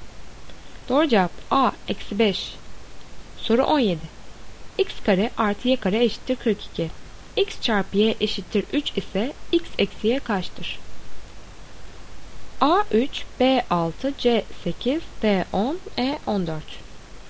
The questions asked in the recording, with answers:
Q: X çarpı Y eşittir 3 ise X eksi Y kaçtır?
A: Doğru cevap B 6.